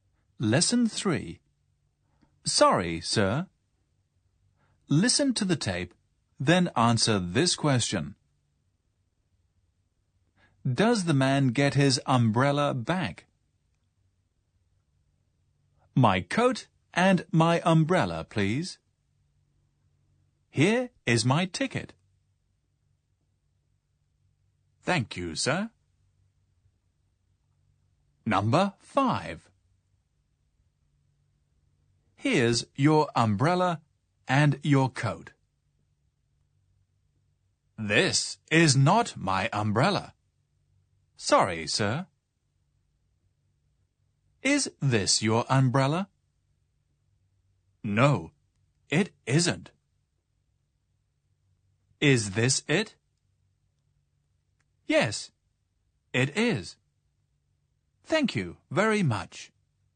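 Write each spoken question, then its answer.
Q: Does the man get his umbrella back?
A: Yes, he does.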